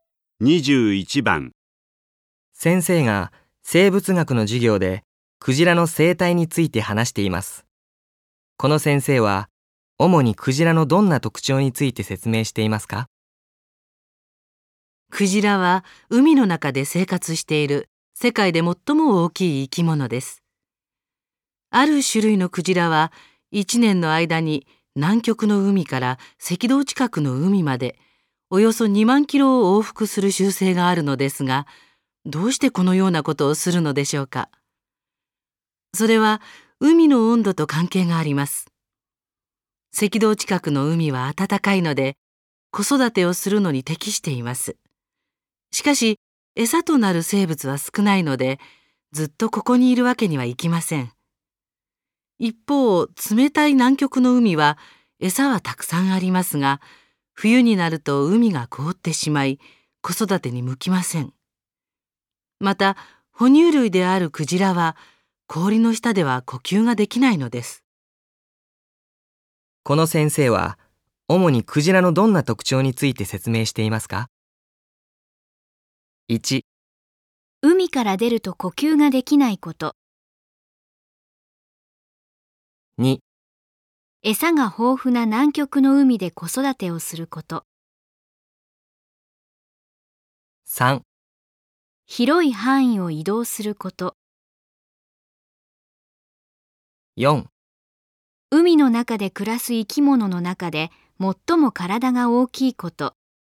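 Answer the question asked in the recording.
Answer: 3: 広い範囲を移動すること。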